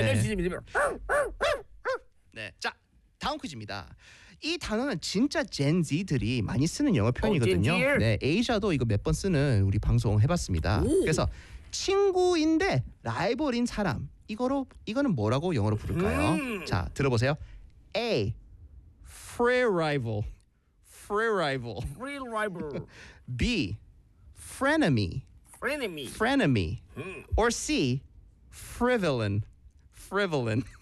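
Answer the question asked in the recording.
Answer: B: Frenemy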